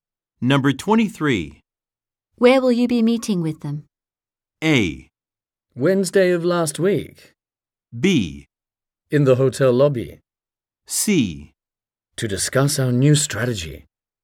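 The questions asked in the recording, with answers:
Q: Where will you be meeting with them?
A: B: In the hotel lobby.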